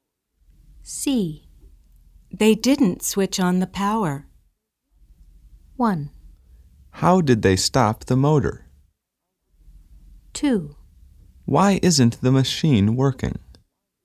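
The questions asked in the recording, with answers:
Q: They didn't switch on the power.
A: 2: Why isn't the machine working?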